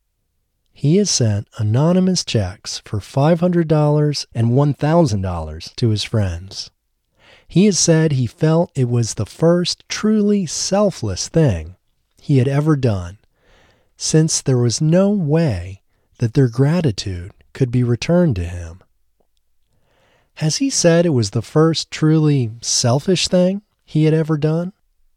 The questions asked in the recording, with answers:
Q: Has he said it was the first truly selfish thing he had ever done?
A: No, he hasn't said it was the first truly selfish thing he had ever done.